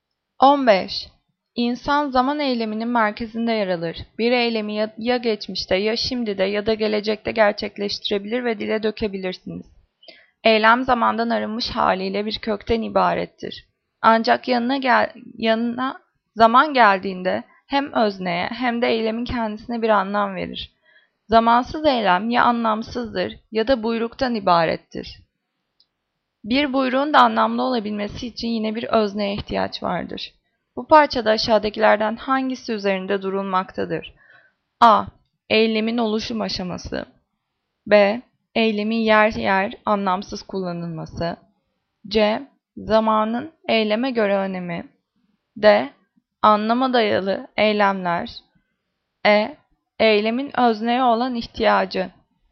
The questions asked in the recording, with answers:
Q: Bu parçada aşağıdakilerden hangisi üzerinde durulmaktadır?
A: Cevap C. Zamanın eyleme göre önemi.